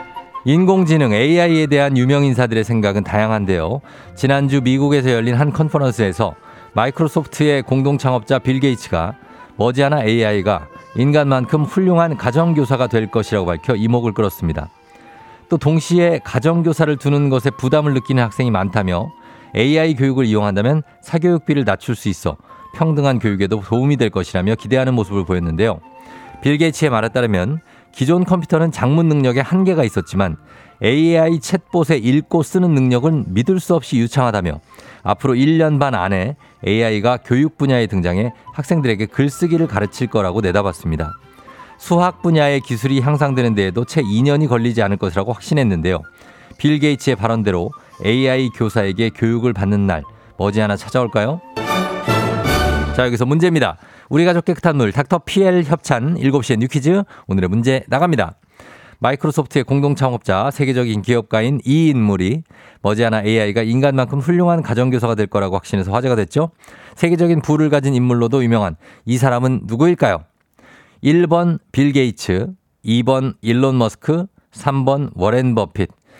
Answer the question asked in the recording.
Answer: 1번 빌 게이츠죠.